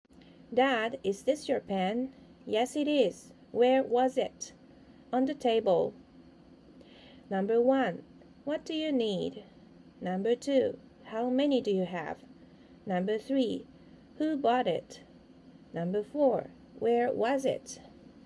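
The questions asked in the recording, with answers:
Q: where was it?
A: On the table.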